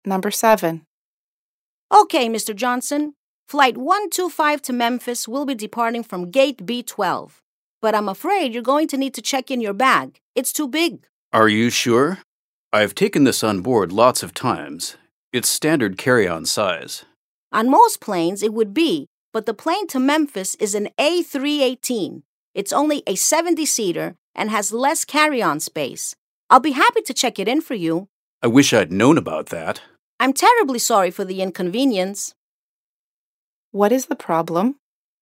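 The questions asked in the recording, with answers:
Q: What is the problem?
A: His bag is too big to carry on the small plane, so he has to check it in.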